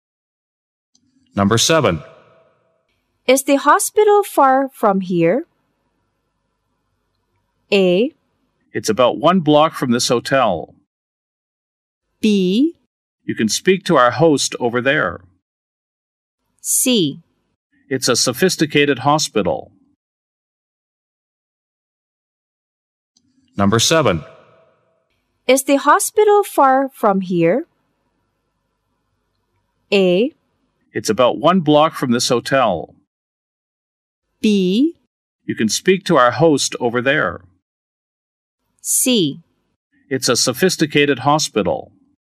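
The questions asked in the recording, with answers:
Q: Is the hospital far from here?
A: A: It's about one block from this hotel.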